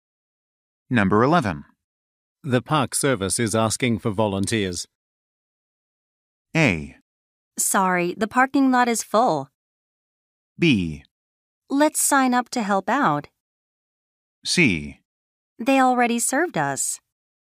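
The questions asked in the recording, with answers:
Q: The Park Service is asking for volunteers.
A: B: Let's sign up to help out.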